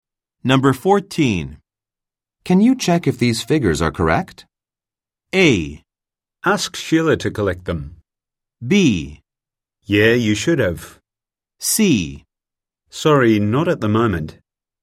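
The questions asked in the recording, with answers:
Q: Can you check if these figures are correct?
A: C: Sorry, not at the moment.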